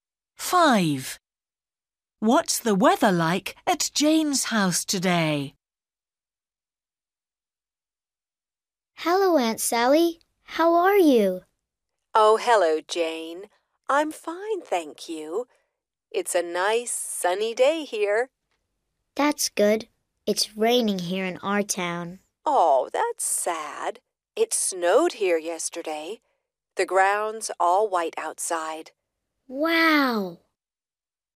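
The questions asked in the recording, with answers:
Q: What's the weather like at Jane's house today?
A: It's raining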